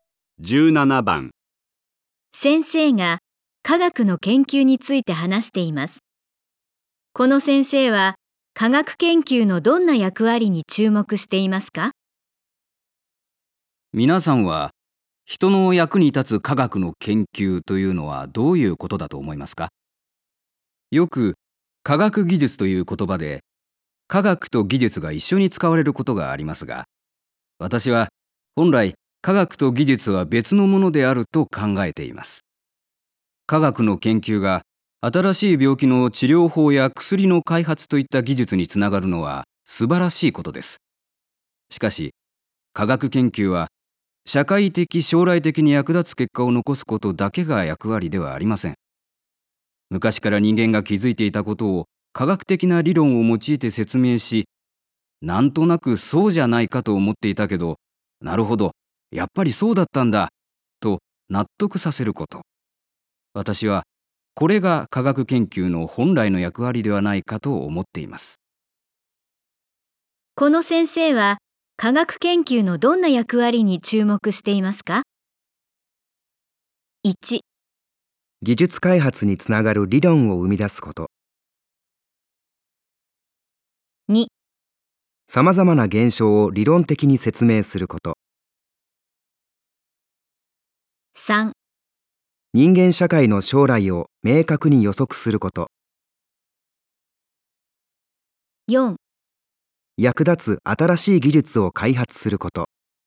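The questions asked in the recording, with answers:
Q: この先生は科学研究のどんな役割に注目していますか?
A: 2: さまざまな現象を理論的に説明すること。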